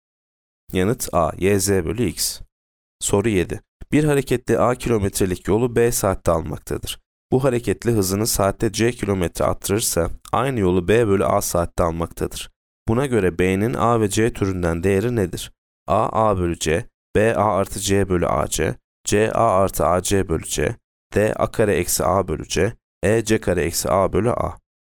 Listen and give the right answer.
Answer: Yanıt D. A kare eksi A bölü C.